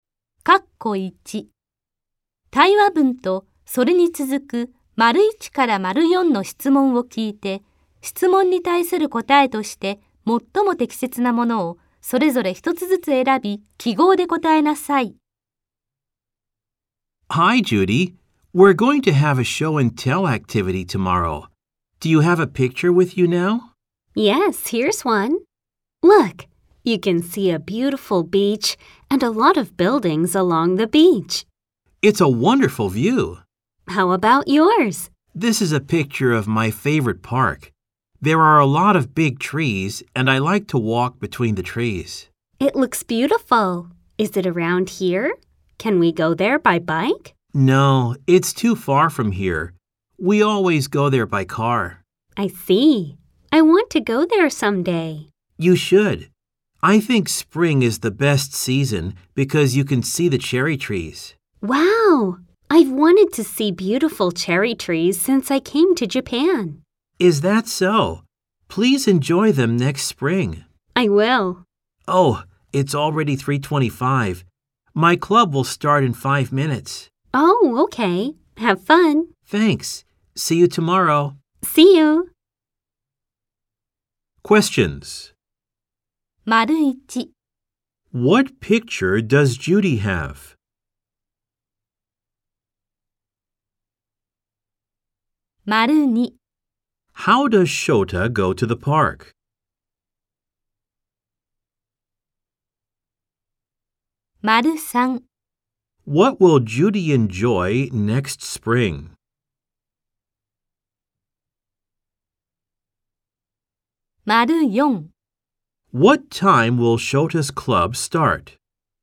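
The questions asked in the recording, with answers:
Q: What picture does Judy have?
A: A picture of a beautiful beach with many buildings along it

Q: How does Shota go to the park?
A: By car

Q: What will Judy enjoy next spring?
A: The cherry trees

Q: What time will Shota's club start?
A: At 3:30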